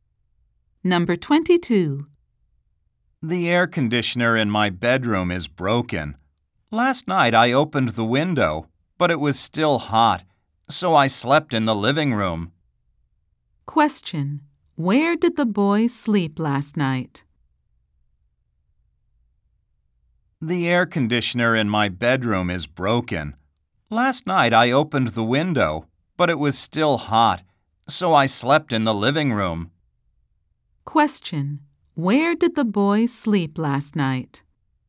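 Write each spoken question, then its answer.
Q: Where did the boy sleep last night?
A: In the living room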